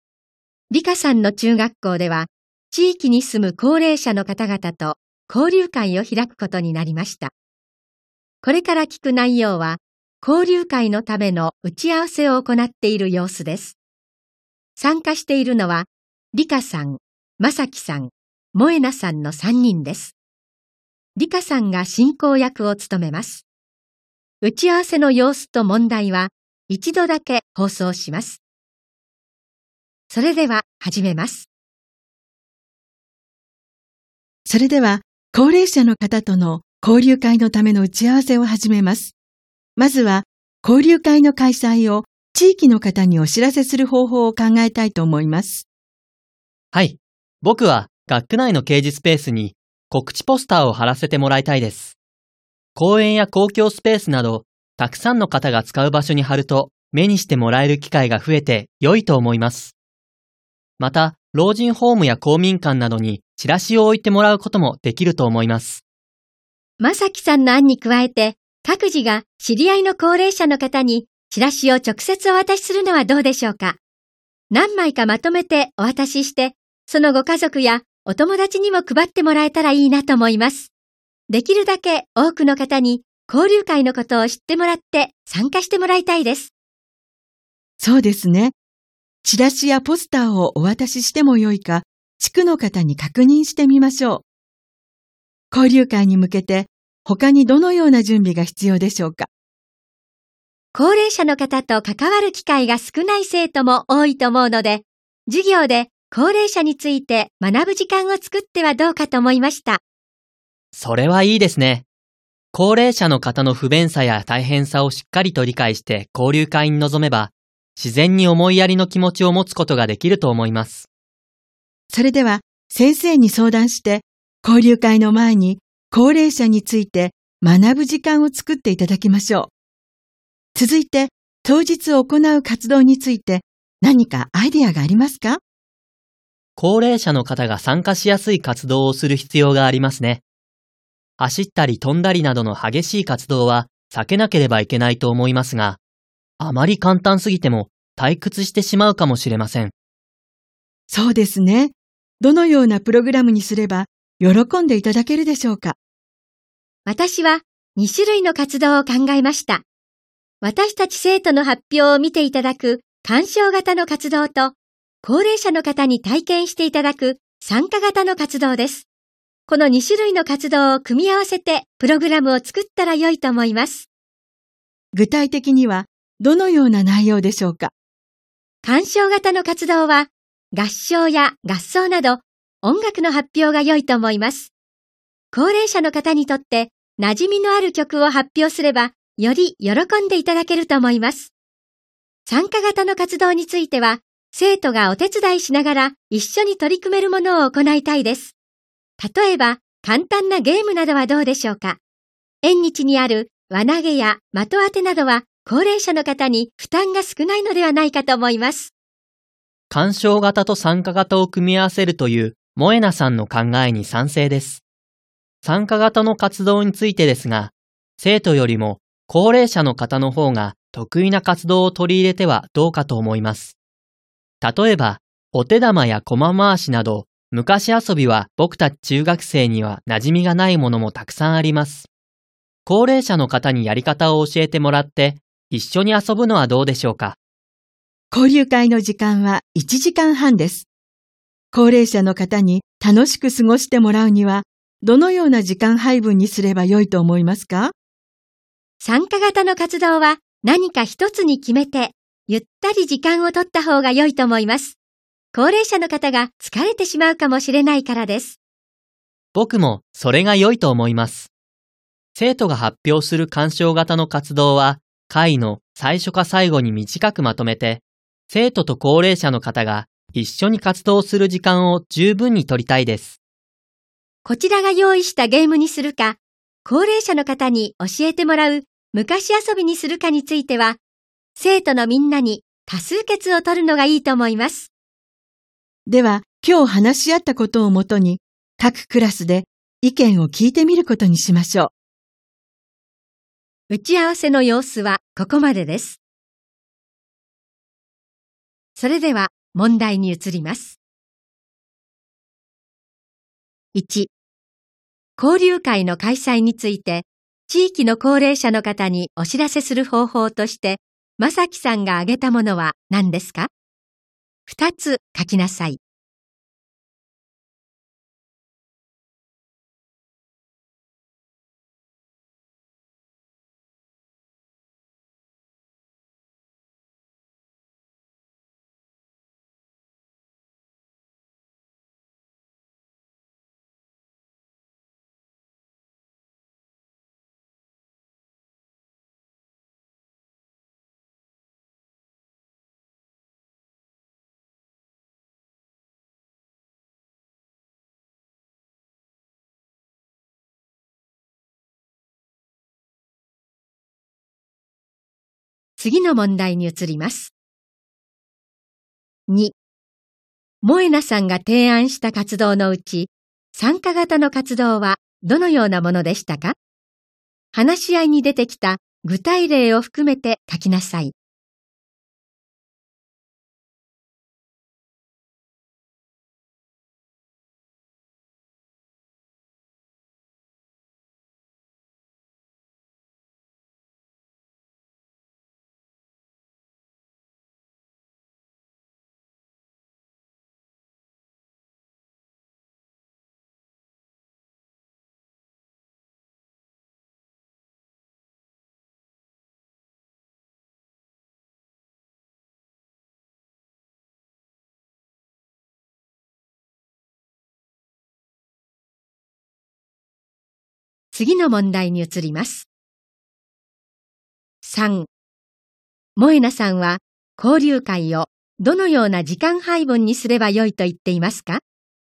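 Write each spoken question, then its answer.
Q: 交流会の開催について、地域の高齢者の方にお知らせする方法として、まさきさんが挙げたものは何ですか?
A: 学区内の掲示スペース(公園や公共スペースなど)に告知ポスターを貼ること、老人ホームや公民館などにチラシを置いてもらうこと

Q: 萌奈さんが提案した活動のうち、参加型の活動はどのようなものでしたか?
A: 生徒が手伝いながら高齢者の方と一緒に取り組める、輪投げや的当てなどの簡単なゲーム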